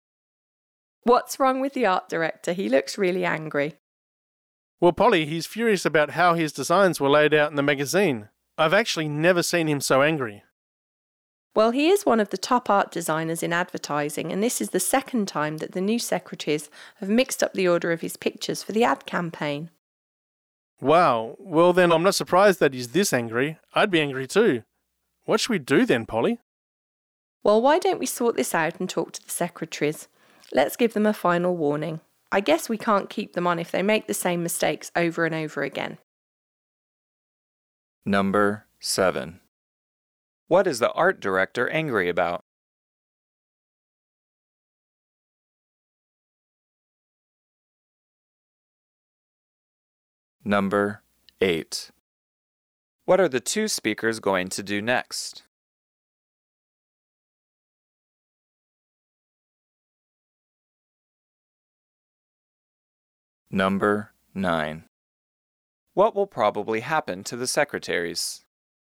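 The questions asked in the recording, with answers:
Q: What is the art director angry about?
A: The secretaries mixed up the order of his pictures in the magazine layout

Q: What are the two speakers going to do next?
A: Talk to the secretaries and give them a final warning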